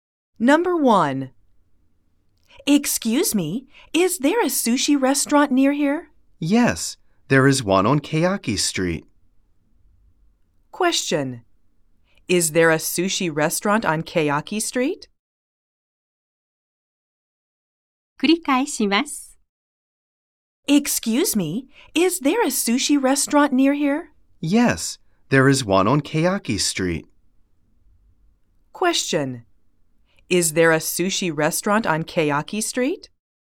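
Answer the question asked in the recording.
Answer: Yes, there is.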